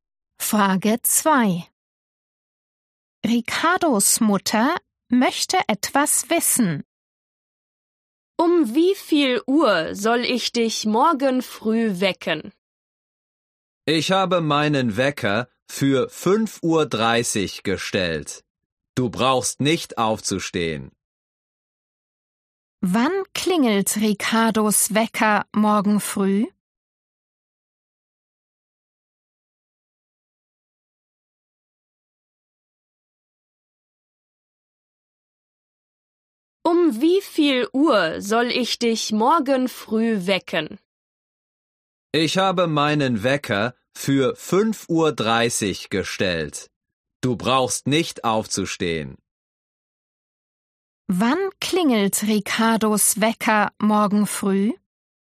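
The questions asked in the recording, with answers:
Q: Wann klingelt Ricardos Wecker morgen früh?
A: um 5.30 Uhr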